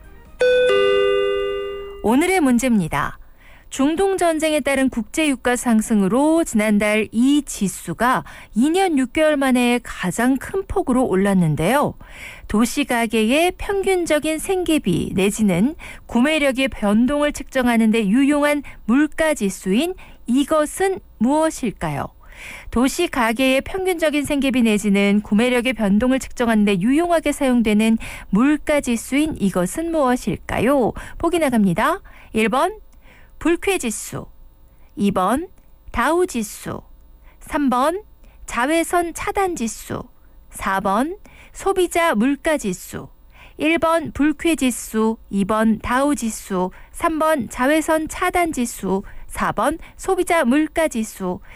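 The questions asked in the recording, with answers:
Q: 도시가계의 평균적인 생계비 내지는 구매력의 변동을 측정하는 데 유용하게 사용되는 물가지수인 이것은 무엇일까요?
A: 4: 소비자 물가지수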